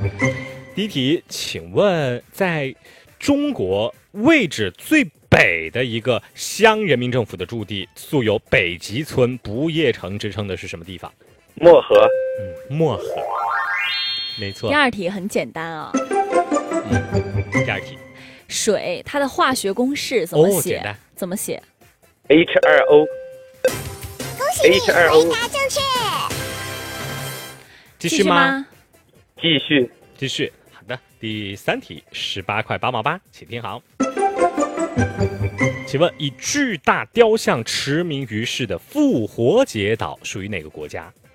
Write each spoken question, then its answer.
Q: 请问在中国位置最北的一个乡人民政府的驻地素有北极村不夜城之称的是什么地方?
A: 漠河。 没错。

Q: 水它的化学公式怎么写?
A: H2O。